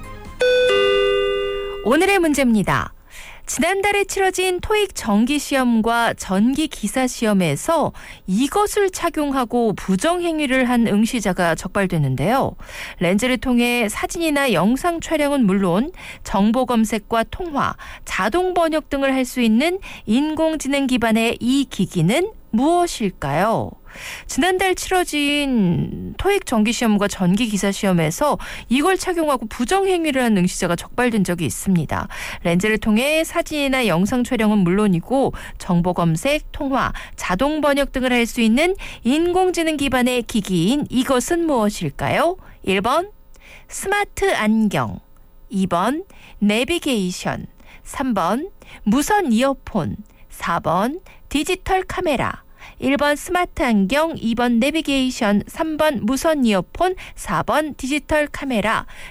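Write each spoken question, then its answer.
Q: 렌즈를 통해 사진이나 영상 촬영은 물론이고 정보 검색, 통화, 자동 번역 등을 할 수 있는 인공지능 기반의 기기인 이것은 무엇일까요?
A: 1: 스마트 안경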